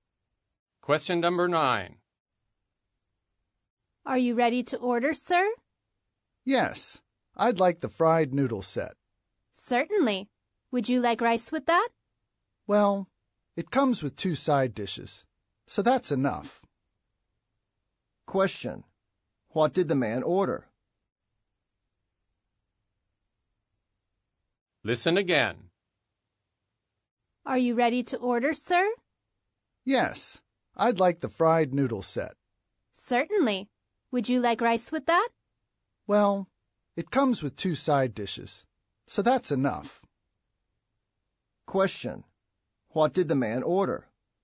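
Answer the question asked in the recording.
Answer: The fried noodle set, without rice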